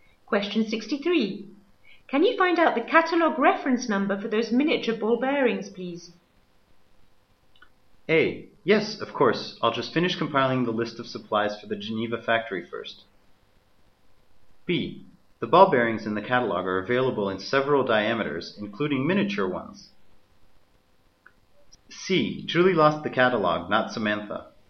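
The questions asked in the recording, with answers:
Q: Can you find out the catalogue reference number for those miniature ball bearings, please?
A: A: Yes, of course. I'll just finish compiling the list of supplies for the Geneva factory first.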